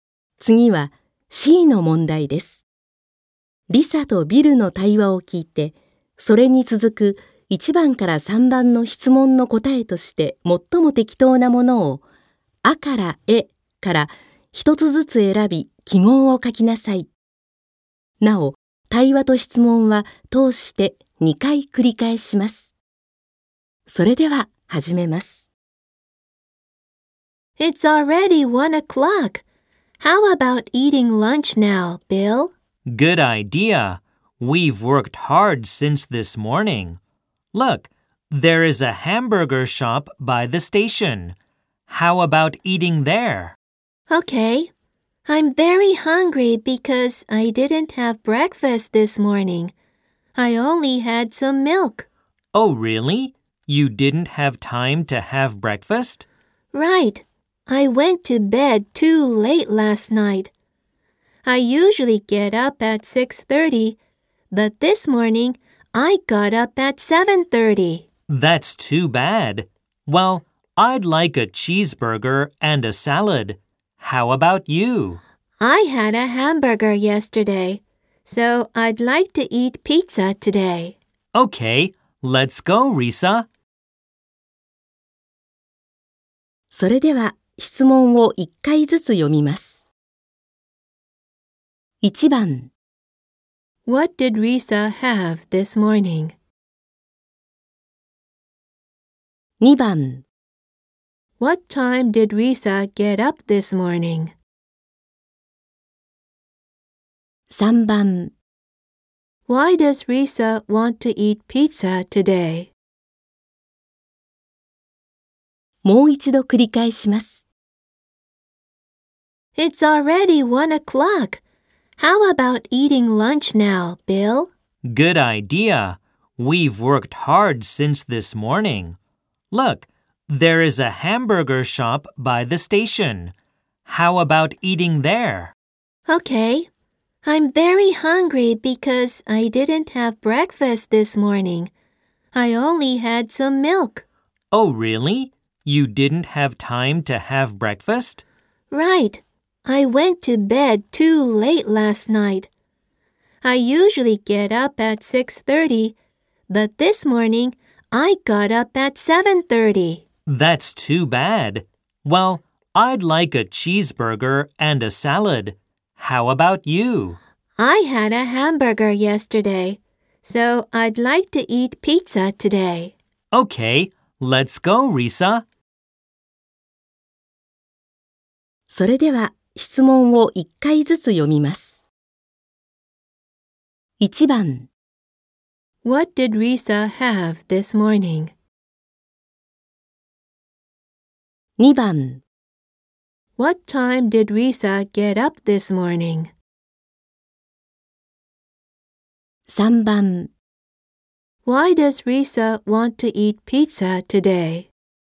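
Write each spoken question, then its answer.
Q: What did Risa have this morning?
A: Only some milk

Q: What time did Risa get up this morning?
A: At 7:30

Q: Why does Risa want to eat pizza today?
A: Because she had a hamburger yesterday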